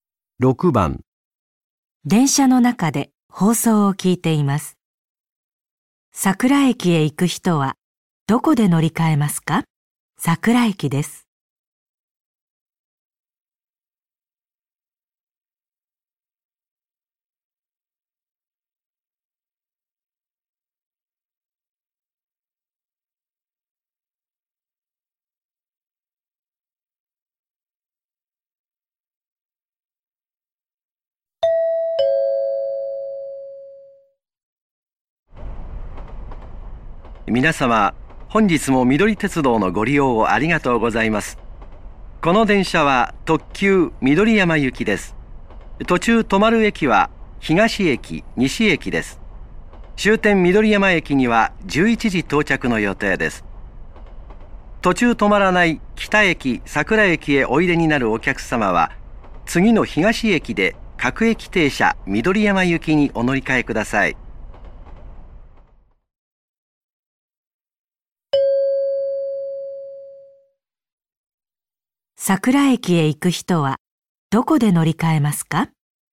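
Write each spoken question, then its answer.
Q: 桜駅へ行く人はどこで乗り換えますか?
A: 東駅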